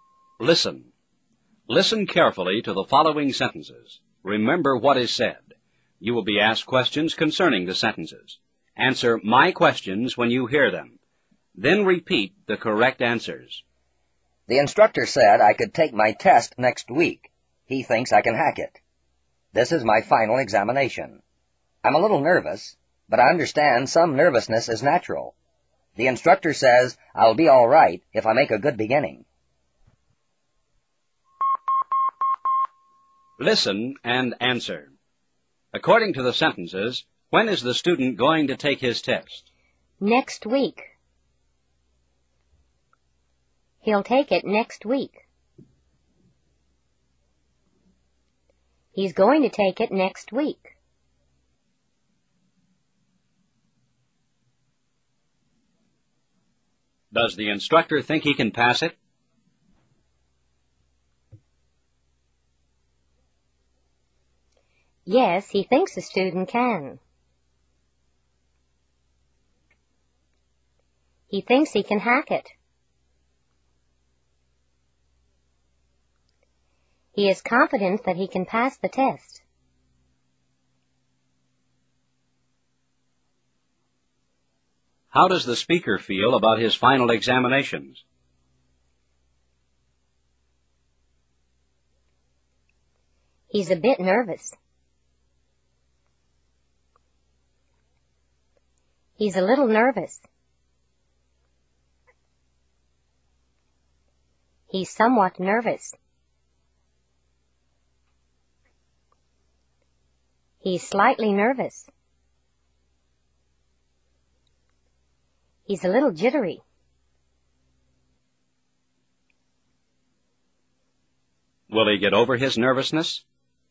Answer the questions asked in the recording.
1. Next week.
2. Yes, he thinks the student can.
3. He's a bit nervous.
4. Sure. It's natural to be nervous.